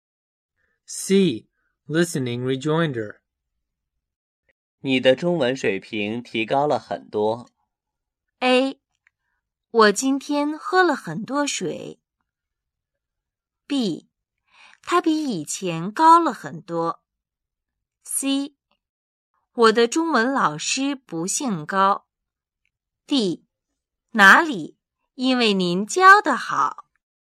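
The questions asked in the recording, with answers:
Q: 你的中文水平提高了很多。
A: D: 哪里?因为您教得好。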